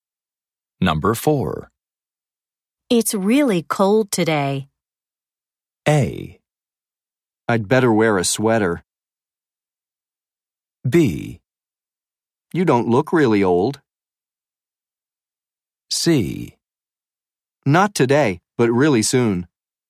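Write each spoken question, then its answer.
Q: It's really cold today.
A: A: I'd better wear a sweater.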